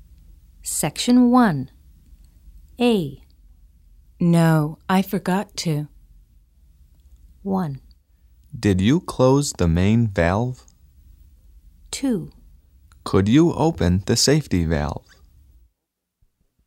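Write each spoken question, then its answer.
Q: No, I forgot to.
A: 1: Did you close the main valve?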